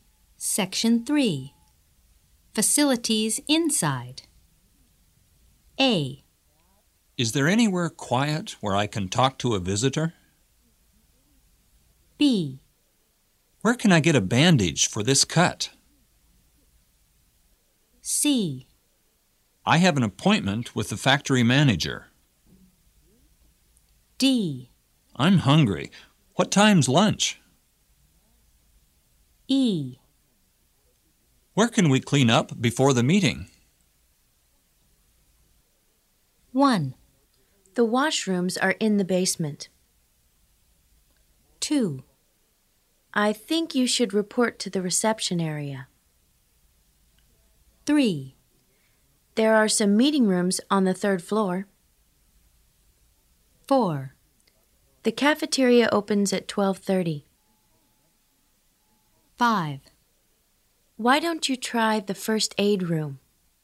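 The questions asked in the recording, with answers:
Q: The washrooms are in the basement.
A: E: Where can we clean up before the meeting?

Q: I think you should report to the reception area.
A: C: I have an appointment with the factory manager.

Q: There are some meeting rooms on the third floor.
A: A: Is there anywhere quiet where I can talk to a visitor?

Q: The cafeteria opens at 12:30.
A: D: I'm hungry. What time's lunch?

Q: Why don't you try the first aid room?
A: B: Where can I get a bandage for this cut?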